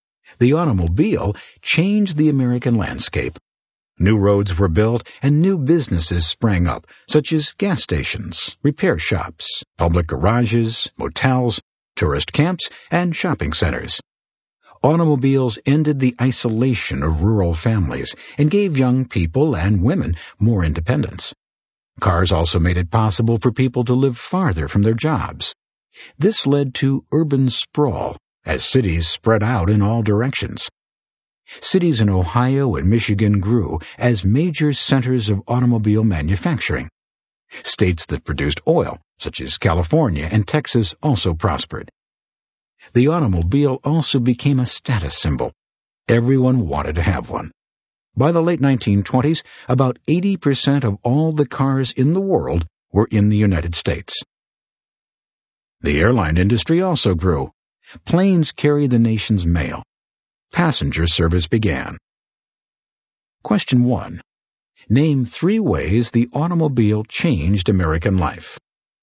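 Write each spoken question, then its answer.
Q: Name three ways the automobile changed American life.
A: New roads and businesses (gas stations, motels, etc.), ended rural isolation and gave young people and women more independence, allowed people to live farther from jobs (urban sprawl)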